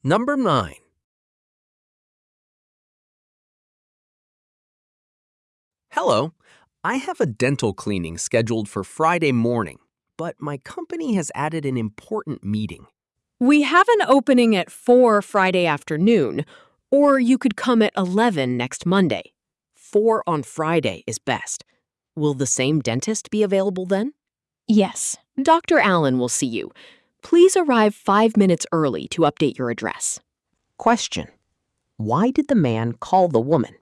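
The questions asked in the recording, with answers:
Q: Why did the man call the woman?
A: To reschedule his dental cleaning because a meeting was added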